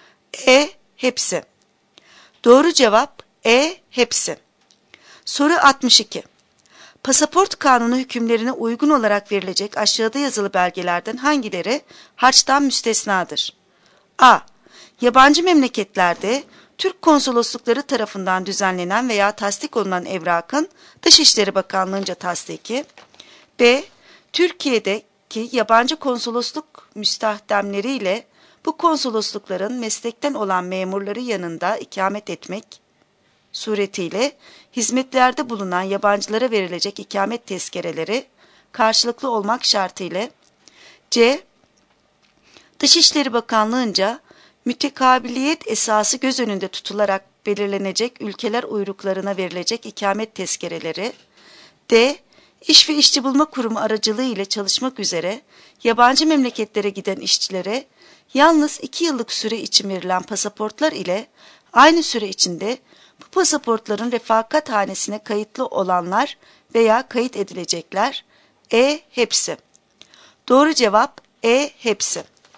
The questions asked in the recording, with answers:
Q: Pasaport kanunu hükümlerine uygun olarak verilecek aşağıda yazılı belgelerden hangileri harçtan müstesnadır?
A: Doğru cevap E. Hepsi.